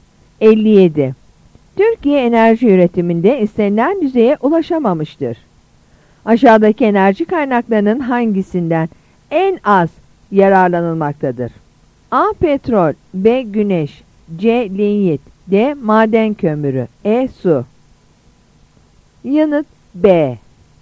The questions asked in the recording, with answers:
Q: Aşağıdaki enerji kaynaklarının hangisinden en az yararlanılmaktadır?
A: Yanıt B.